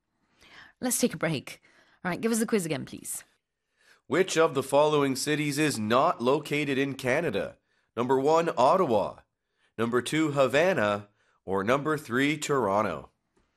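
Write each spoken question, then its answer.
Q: Which of the following cities is not located in Canada?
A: 2: Havana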